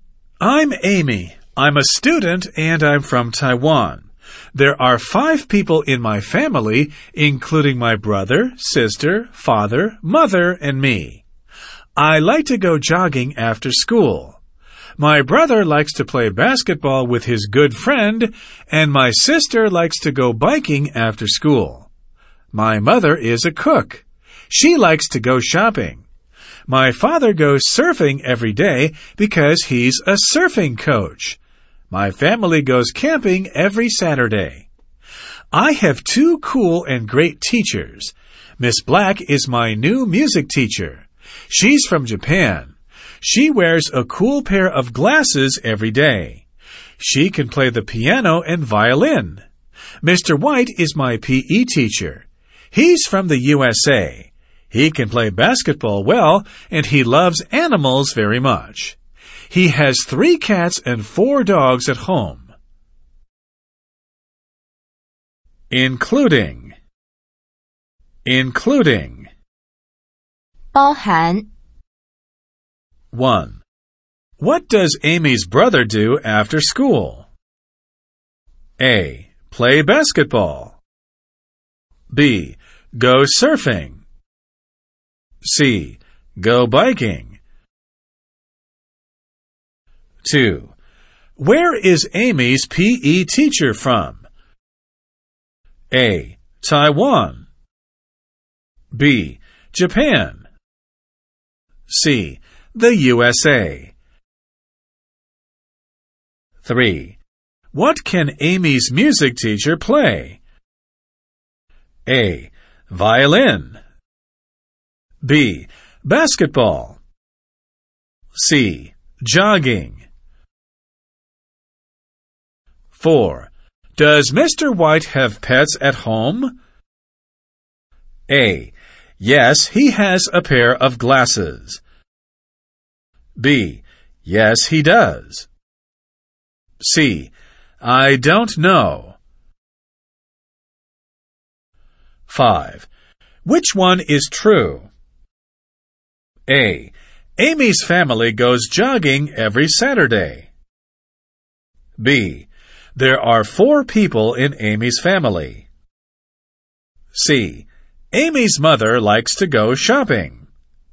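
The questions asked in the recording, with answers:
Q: What does Amy's brother do after school?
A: A: Play basketball.

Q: Where is Amy's PE teacher from?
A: C: The USA.

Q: What can Amy's music teacher play?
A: A: Violin.

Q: Does Mr. White have pets at home?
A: B: Yes, he does.

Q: Which one is true?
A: C: Amy's mother likes to go shopping.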